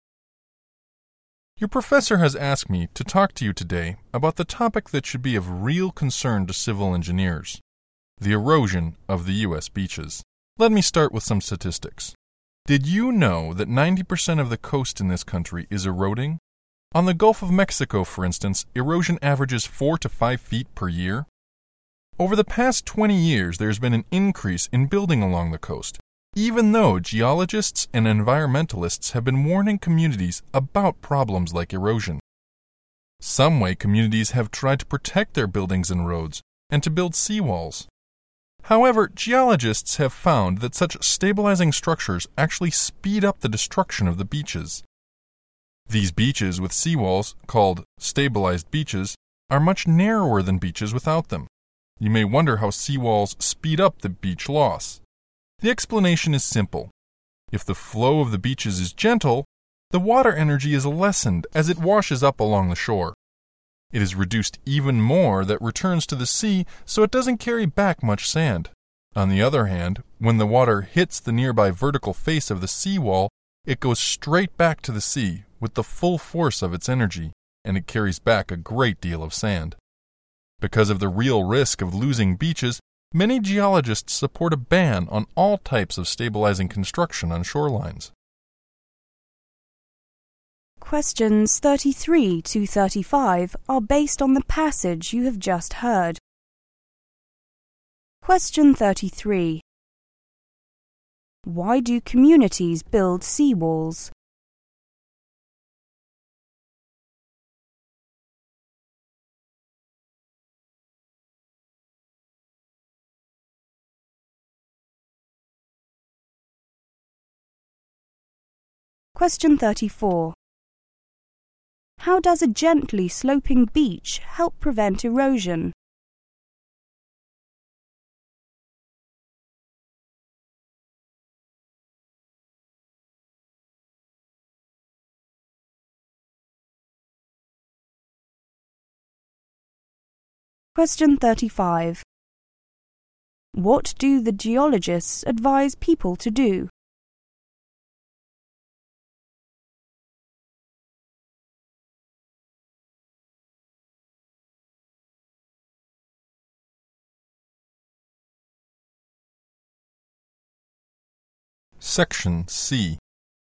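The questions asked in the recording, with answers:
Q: Why do communities build seawalls?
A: To protect their buildings and roads

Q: How does a gently sloping beach help prevent erosion?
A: It lessens the water's energy, so the water carries back little sand

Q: What do the geologists advise people to do?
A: Ban all types of stabilizing construction on shorelines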